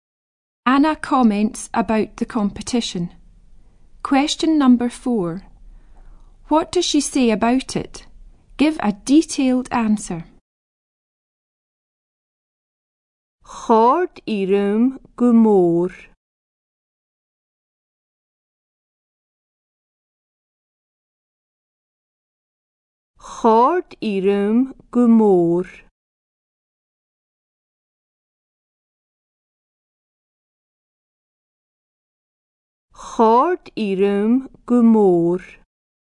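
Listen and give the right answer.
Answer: She enjoyed it very much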